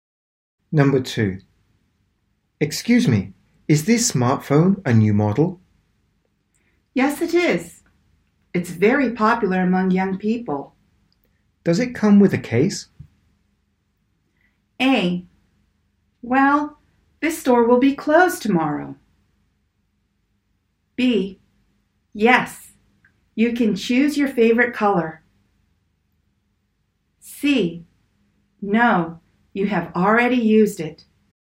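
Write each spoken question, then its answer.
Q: Does it come with a case?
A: B: Yes, you can choose your favorite color.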